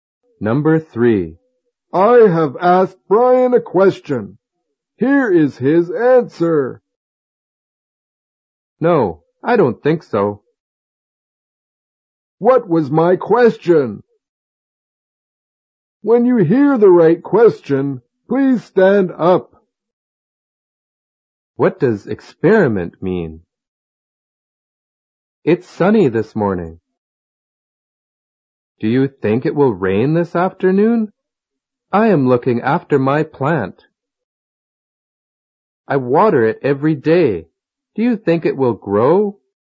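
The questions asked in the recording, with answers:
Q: What was my question?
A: It's sunny this morning. Do you think it will rain this afternoon?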